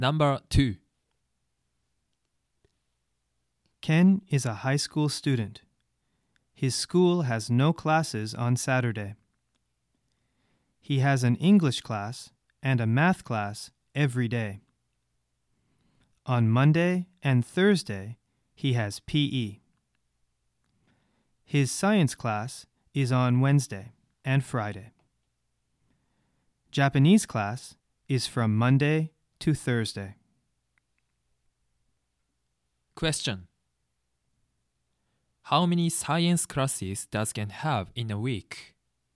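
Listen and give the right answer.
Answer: Two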